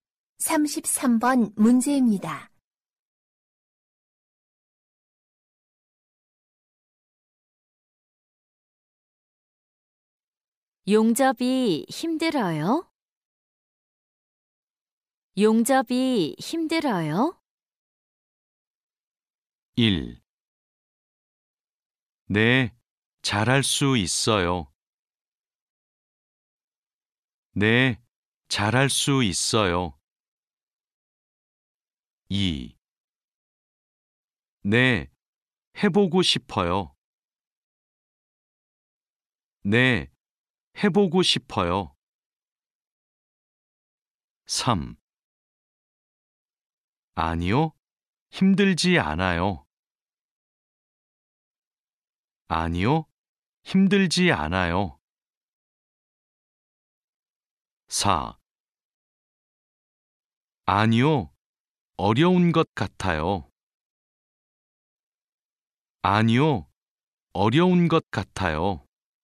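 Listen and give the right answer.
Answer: 3: 아니요, 힘들지 않아요.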